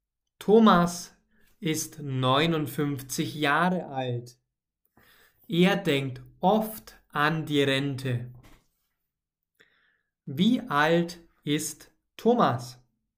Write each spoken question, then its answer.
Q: Wie alt ist Thomas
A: Neunundfünfzig. Thomas ist neunundfünfzig Jahre alt.